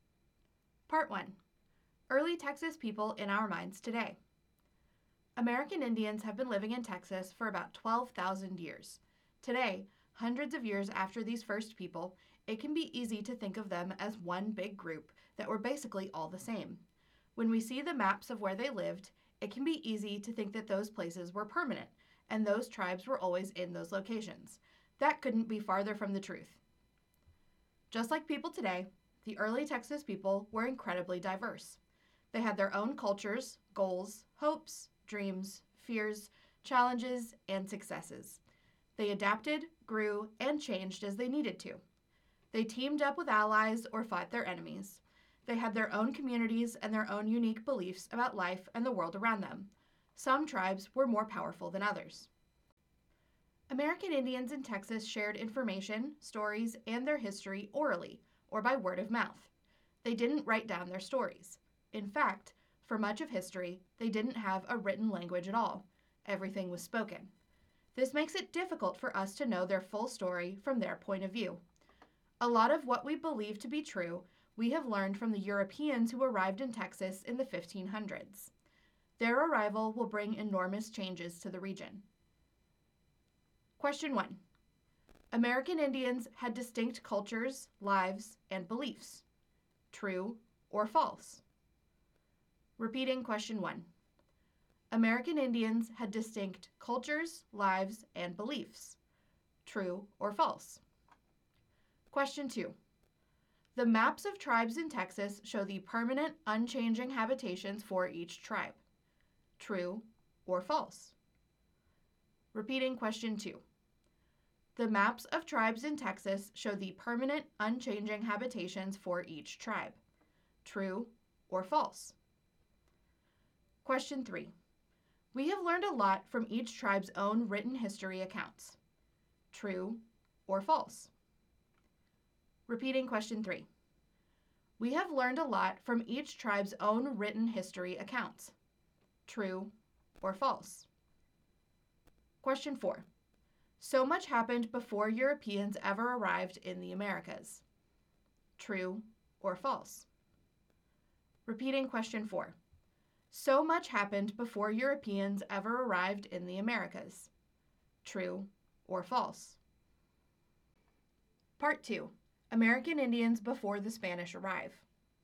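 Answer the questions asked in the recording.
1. True
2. False
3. False
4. True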